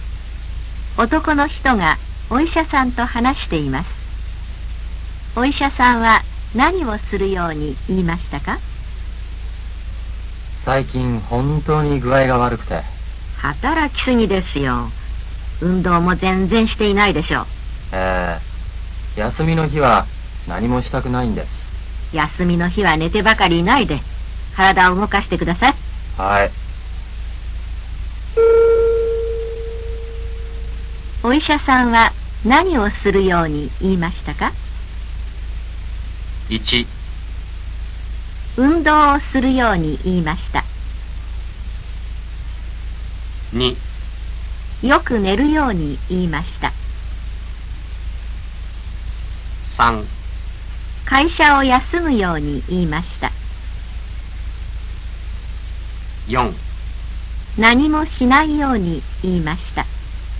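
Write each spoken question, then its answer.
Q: お医者さんは何をするように言いましたか?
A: 1: 運動をするように言いました。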